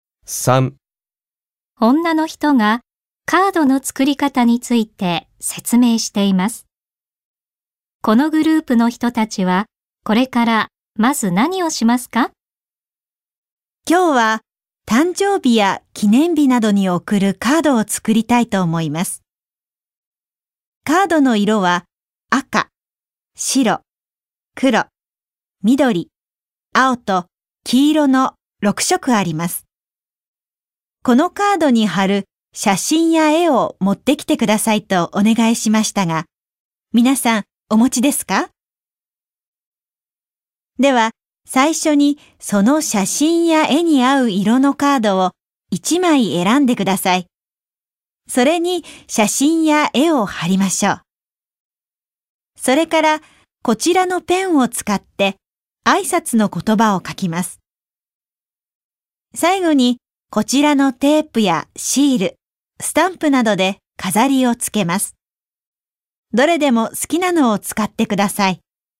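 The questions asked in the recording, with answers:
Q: このグループの人たちはこれからまず何をしますか?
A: 写真や絵に合う色のカードを1枚選ぶ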